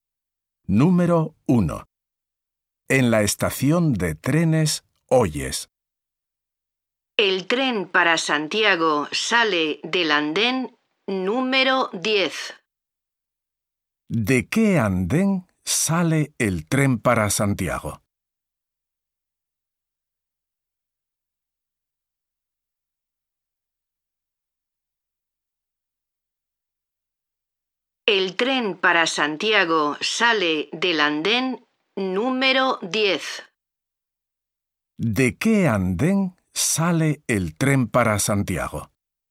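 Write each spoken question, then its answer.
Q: ¿De qué andén sale el tren para Santiago?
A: Del andén número 10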